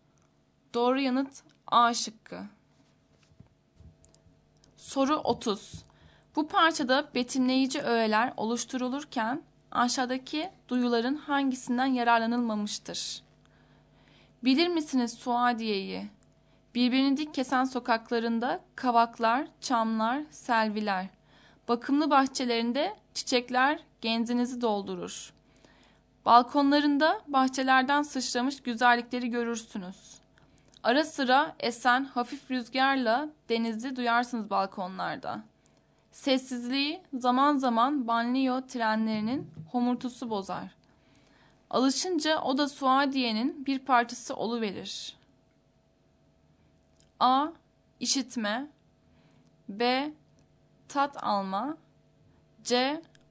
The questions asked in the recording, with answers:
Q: Bu parçada betimleyici öğeler oluşturulurken aşağıdaki duyuların hangisinden yararlanılmamıştır?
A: Doğru yanıt B şıkkı.